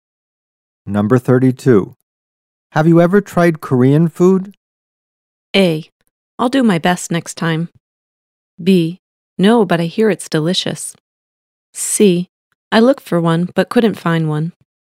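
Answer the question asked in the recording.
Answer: B: No, but I hear it's delicious.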